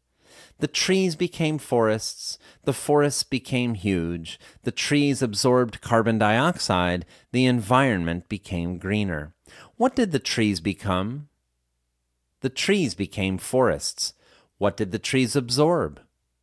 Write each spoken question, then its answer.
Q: What did the trees absorb?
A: The trees absorbed carbon dioxide.